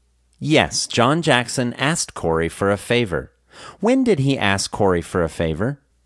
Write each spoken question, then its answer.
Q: When did he ask Corey for a favor?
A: He asked Corey for a favor in 2014.